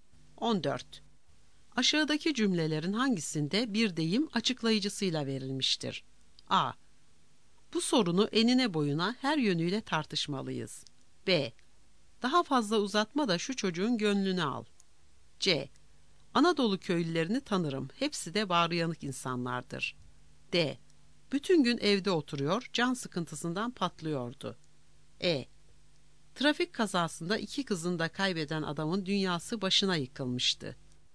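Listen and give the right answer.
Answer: A: Bu sorunu enine boyuna her yönüyle tartışmalıyız.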